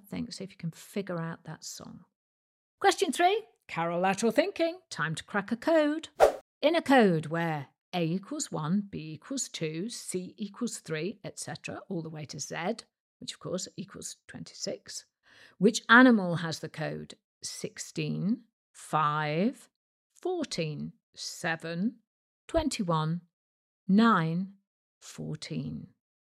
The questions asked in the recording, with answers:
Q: Which animal has the code 16, 5, 14, 7, 21, 9, 14?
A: And the answer was a penguin,